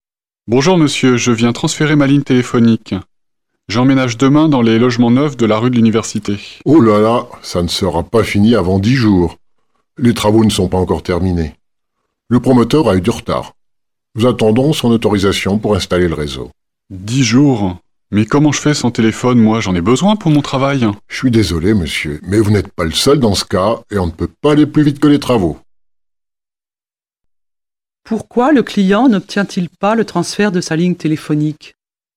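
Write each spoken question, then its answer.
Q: Pourquoi le client n'obtient-il pas le transfert de sa ligne téléphonique?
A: Parce que les travaux des logements neufs ne sont pas terminés (le promoteur a du retard et le réseau n'est pas encore installé).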